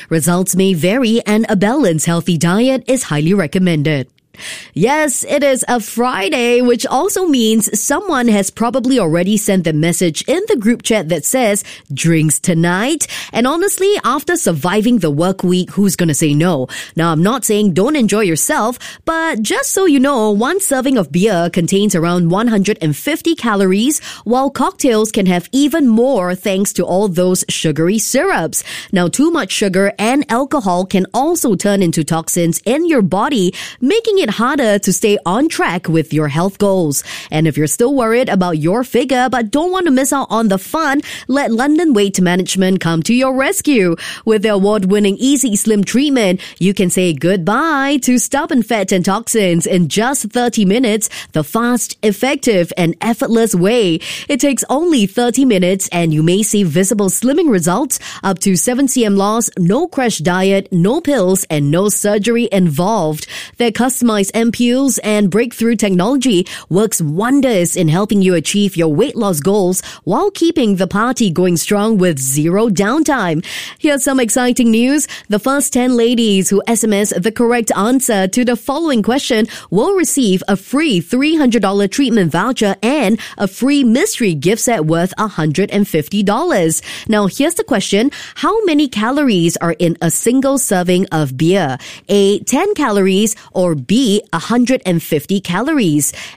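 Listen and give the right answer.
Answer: B: 150 calories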